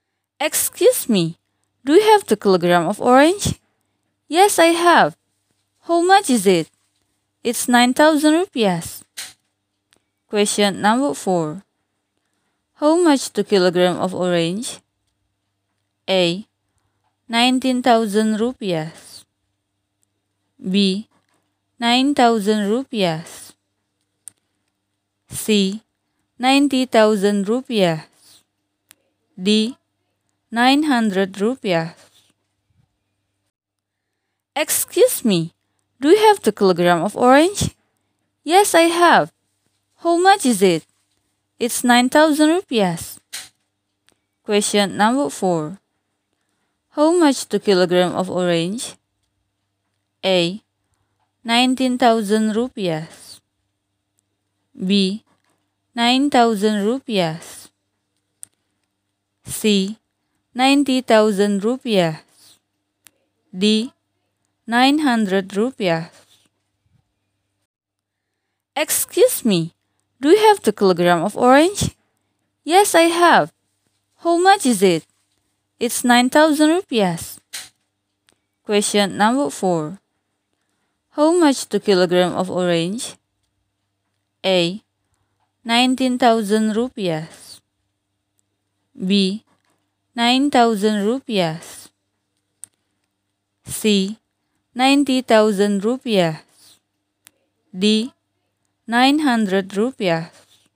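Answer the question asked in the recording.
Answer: B: 9,000 rupiahs.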